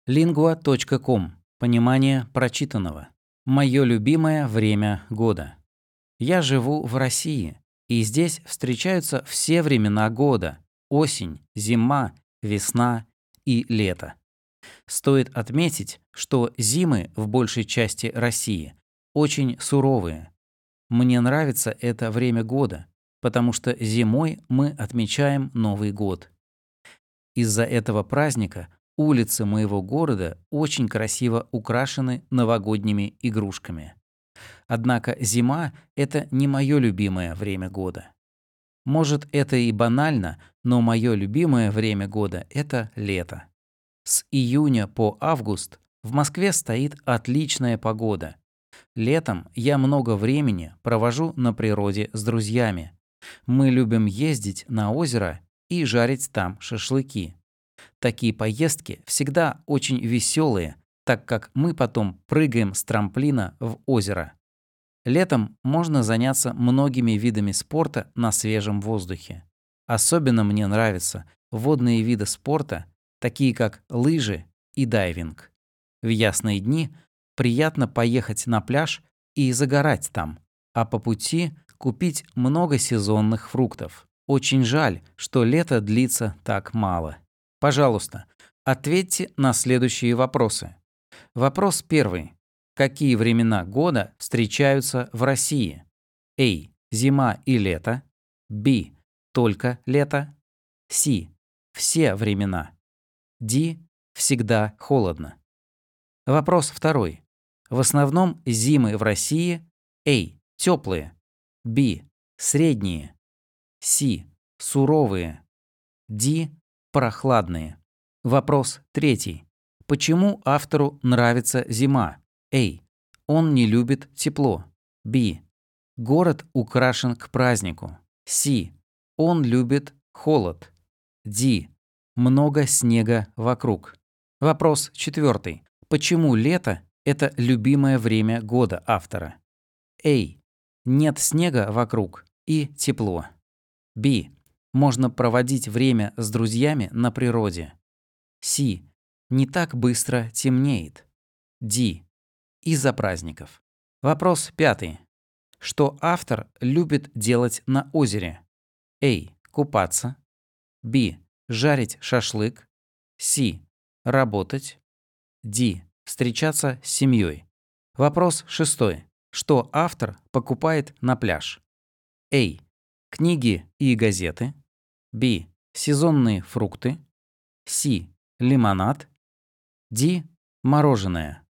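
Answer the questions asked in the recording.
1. С: Все времена.
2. С: Суровые.
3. Б: Город украшен к празднику.
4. Б: Можно проводить время с друзьями на природе.
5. Б: Жарить шашлык.
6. Б: Сезонные фрукты.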